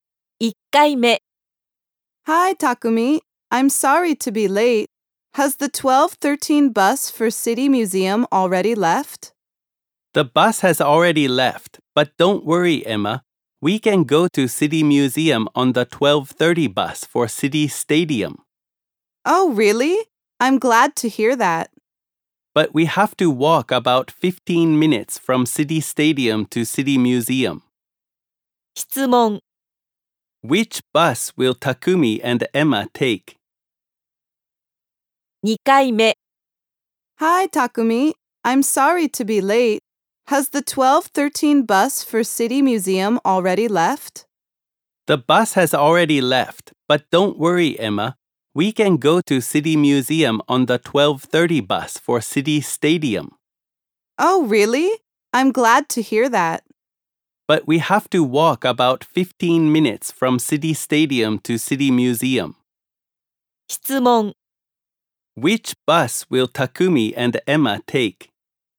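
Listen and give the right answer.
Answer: The 12:30 bus for City Stadium.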